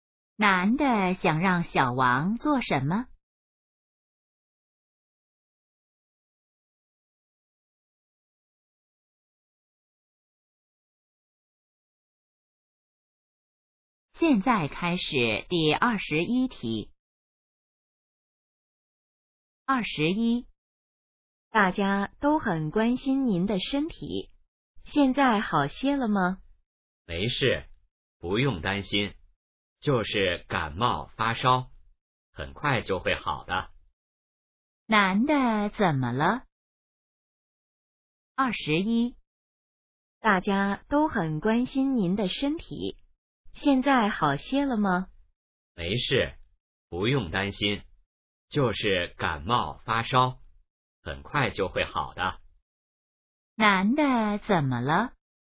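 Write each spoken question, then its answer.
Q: 男的怎么了?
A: 感冒发烧了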